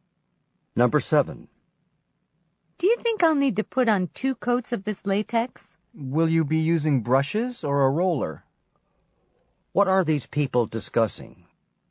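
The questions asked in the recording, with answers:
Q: What are these people discussing?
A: Painting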